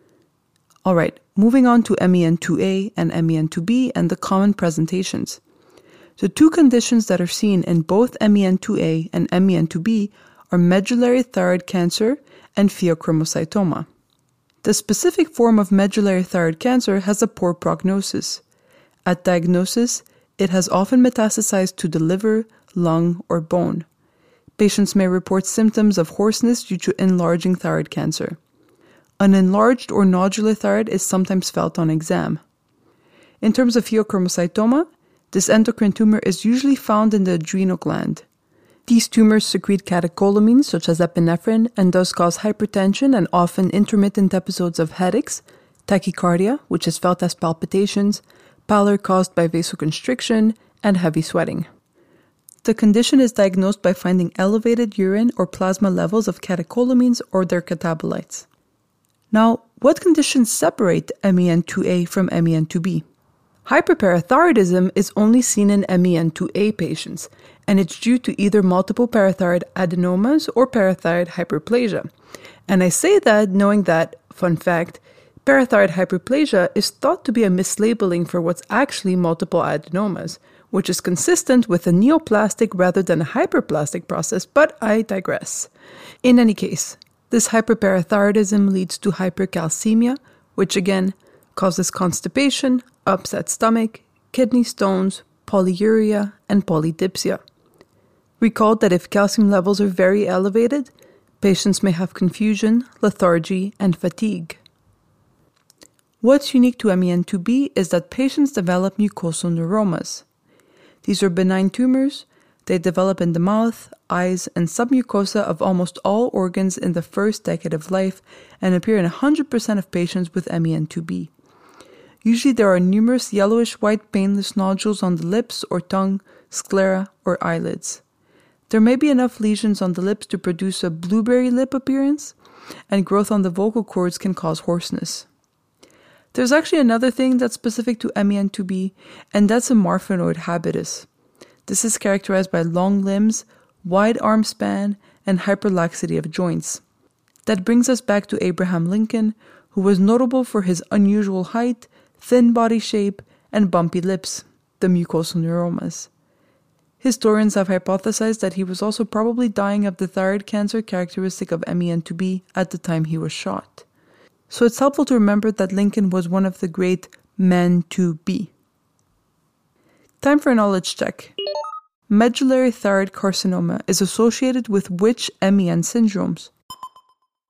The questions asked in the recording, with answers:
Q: Medullary thyroid carcinoma is associated with which MEN syndromes?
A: Medullary thyroid carcinoma is associated with MEN2A as well as MEN2B.